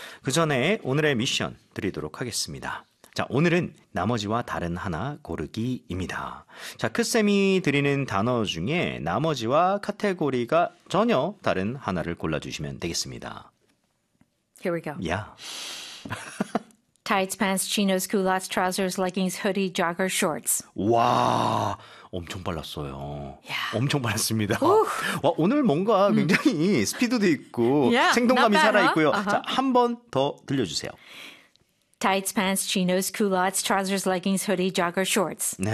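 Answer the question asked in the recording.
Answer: hoodie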